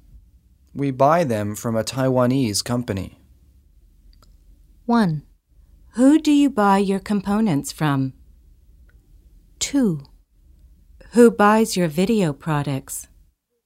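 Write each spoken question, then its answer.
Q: We buy them from a Taiwanese company.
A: 1: Who do you buy your components from?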